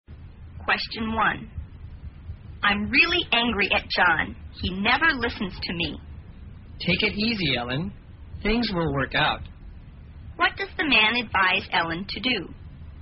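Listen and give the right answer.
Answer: To calm down (take it easy)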